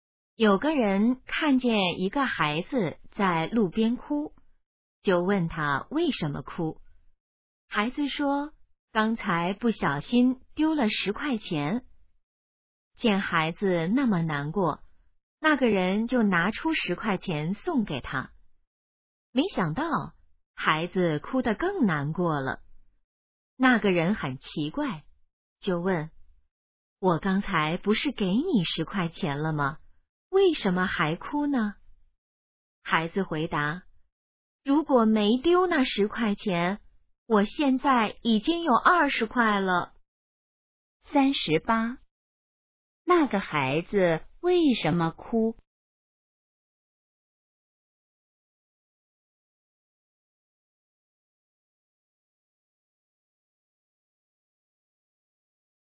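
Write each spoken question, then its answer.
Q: 那个孩子为什么哭?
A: 丢了10块钱

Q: 那个孩子现在有多少钱?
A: 10块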